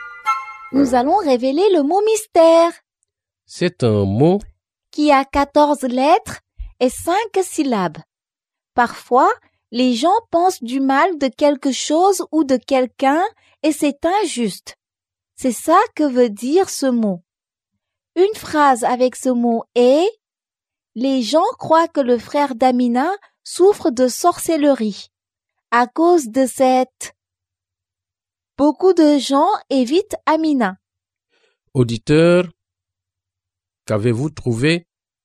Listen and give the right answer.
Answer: Le mot mystère est stigmatisation.